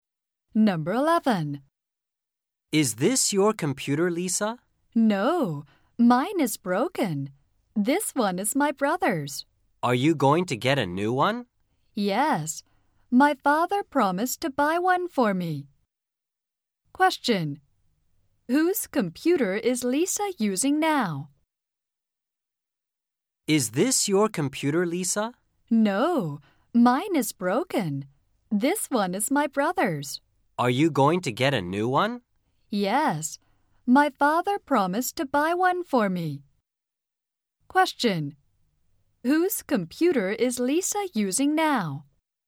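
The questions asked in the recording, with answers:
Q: whose computer is Lisa using now?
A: Her brother's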